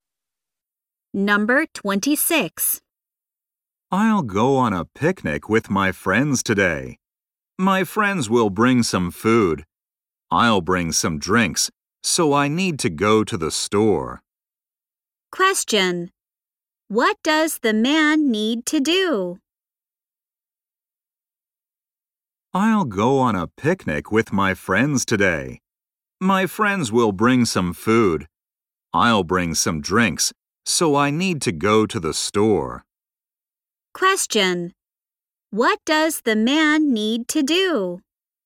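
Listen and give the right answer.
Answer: Go to the store (to buy drinks).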